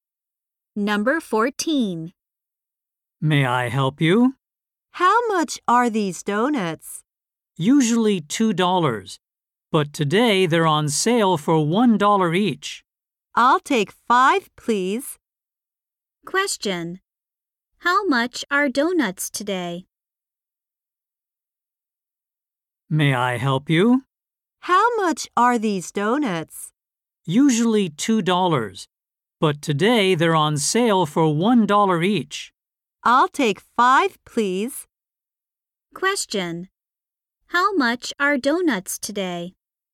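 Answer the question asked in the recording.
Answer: $1 each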